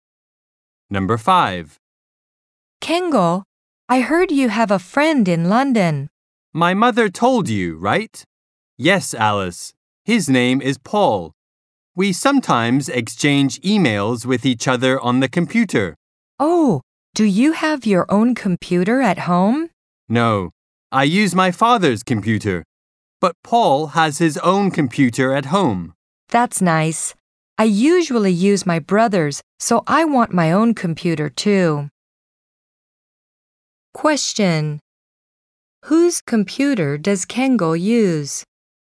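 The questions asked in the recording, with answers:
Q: Whose computer does Kengo use?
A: His father's computer.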